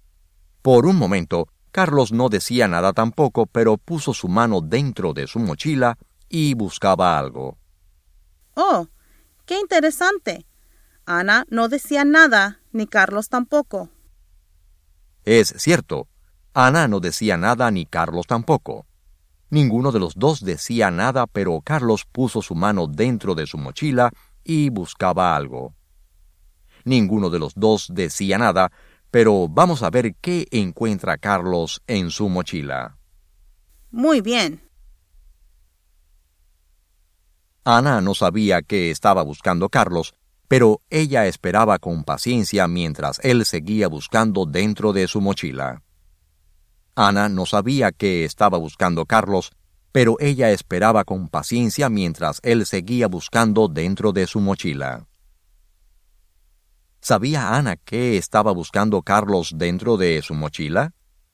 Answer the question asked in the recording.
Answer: No.